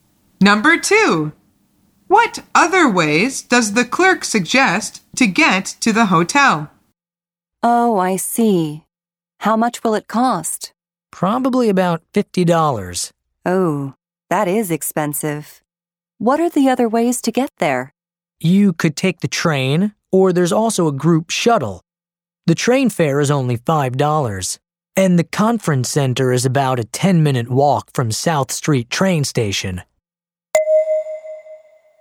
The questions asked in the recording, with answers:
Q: what other ways does the clerk suggest to get to the hotel?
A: The answer is the train or shuttle.